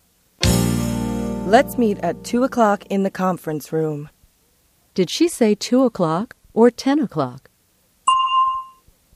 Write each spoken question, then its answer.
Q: Did she say 2 o'clock or 10 o'clock?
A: She said 2 o'clock.